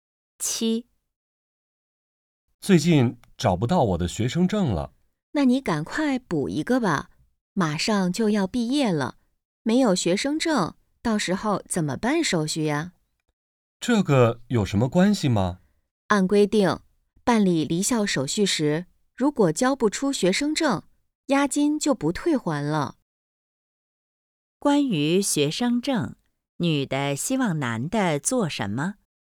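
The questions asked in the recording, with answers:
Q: 关于学生证,女的希望男的做什么?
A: 赶快补办一个学生证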